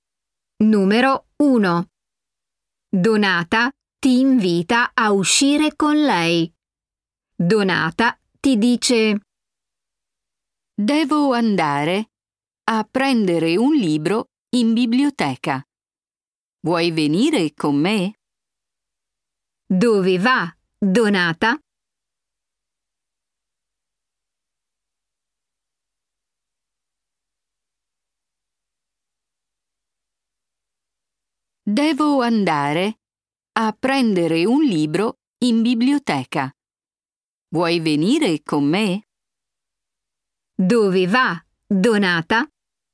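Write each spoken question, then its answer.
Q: Dove va Donata?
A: in biblioteca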